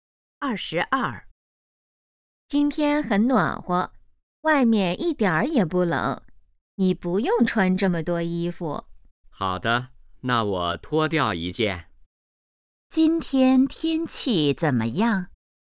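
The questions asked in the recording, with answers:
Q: 今天天气怎么样?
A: 很暖和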